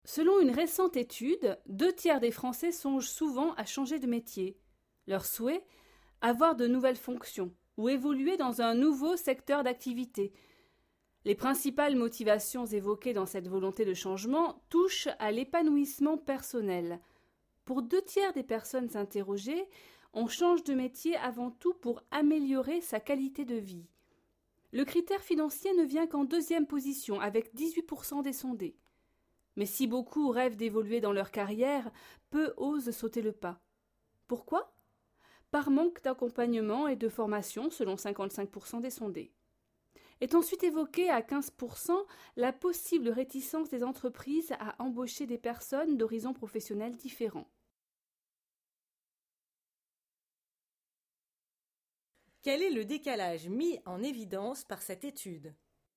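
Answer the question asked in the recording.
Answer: Beaucoup de Français rêvent de changer de métier, mais peu osent le faire.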